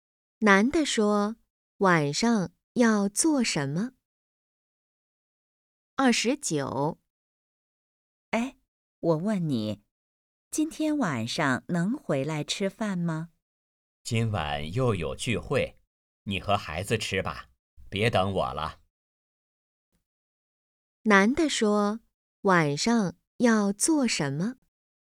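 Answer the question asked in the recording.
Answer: 参加聚会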